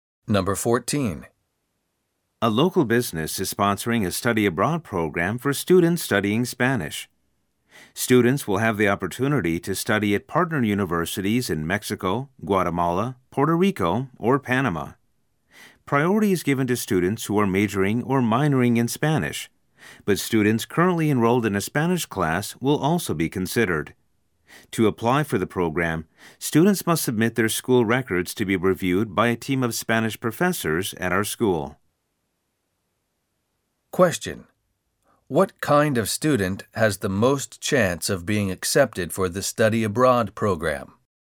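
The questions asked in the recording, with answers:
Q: What kind of student has the most chance of being accepted for the study abroad program?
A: A student majoring or minoring in Spanish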